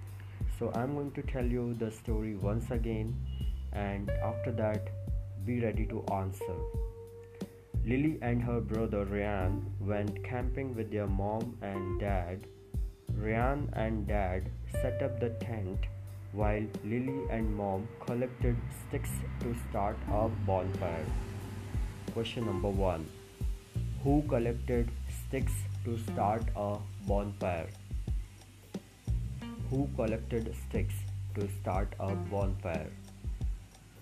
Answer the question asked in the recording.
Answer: Lily and Mom.